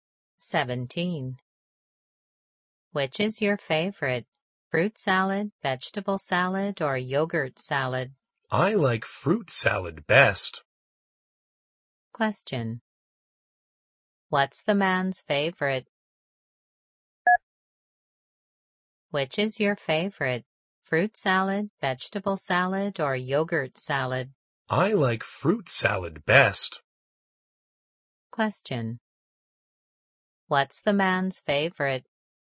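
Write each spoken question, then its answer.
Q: What's the man's favorite?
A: Fruit salad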